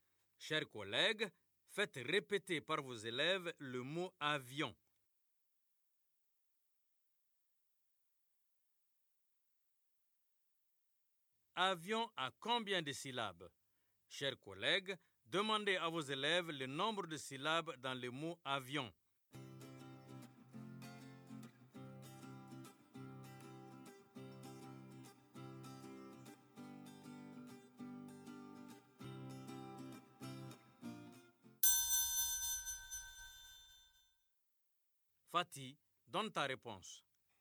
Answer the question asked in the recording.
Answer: Avion. Il y a deux syllabes, monsieur.